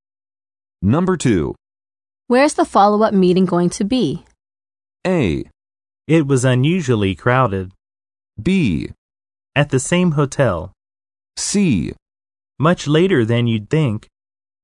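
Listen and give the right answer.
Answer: B: At the same hotel.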